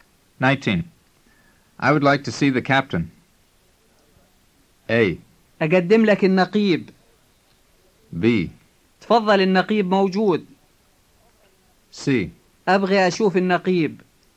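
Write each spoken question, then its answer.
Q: I would like to see the captain.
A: C: أبغي أشوف النقيب.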